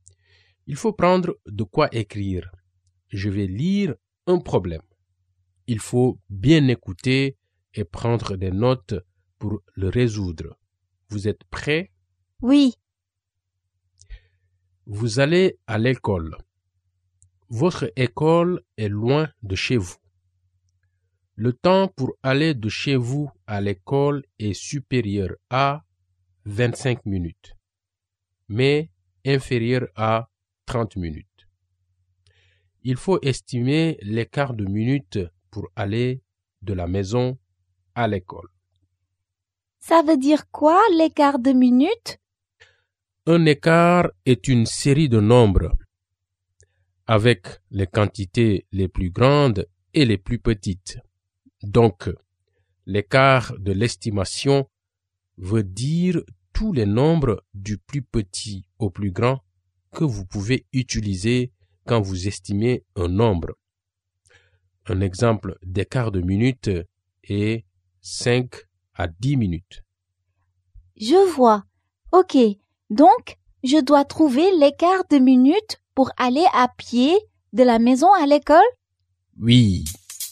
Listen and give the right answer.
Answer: Je pense que ça va prendre de 26 à 29 minutes.